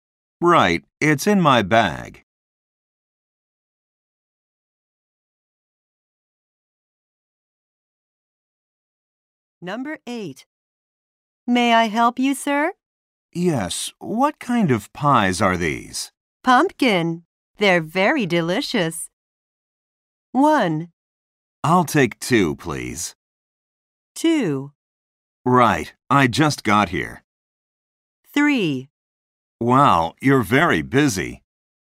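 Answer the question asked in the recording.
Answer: 1: I'll take 2, please.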